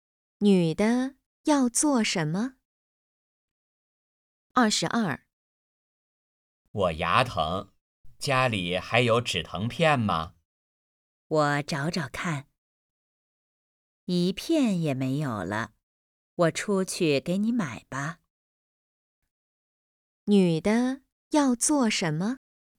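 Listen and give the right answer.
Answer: 出去买止疼片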